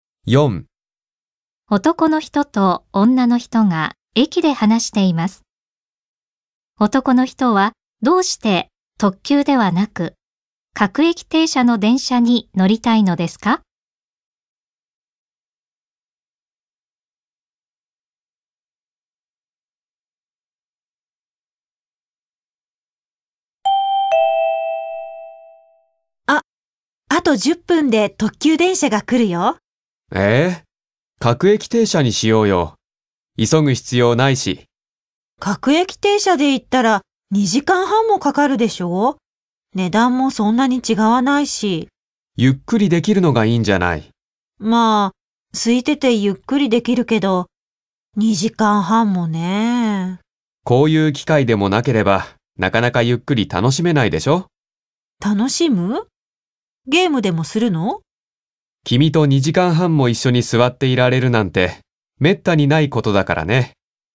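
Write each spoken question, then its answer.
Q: 男の人はどうして特急ではなく各駅停車の電車に乗りたいのですか?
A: 女の人と2時間半も一緒に座っていられるから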